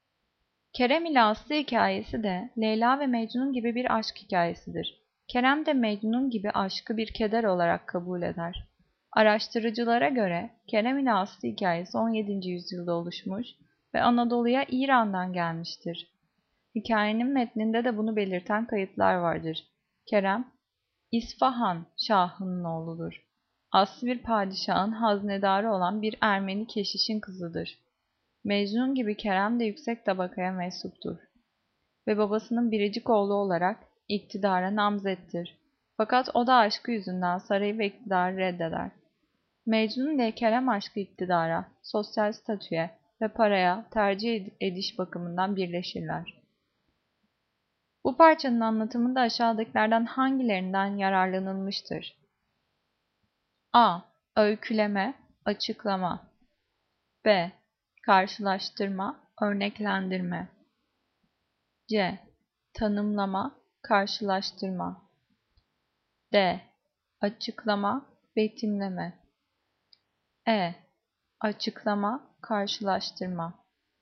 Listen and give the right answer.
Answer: Cevap E. Açıklama, karşılaştırma.